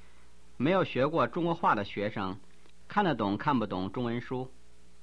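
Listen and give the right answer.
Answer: 看不懂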